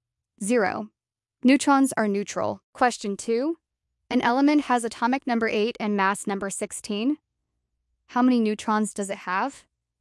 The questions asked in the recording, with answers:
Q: an element has atomic number 8 and mass number 16. How many neutrons does it have?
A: 8. Mass number minus atomic number, 16 minus 8 equals 8.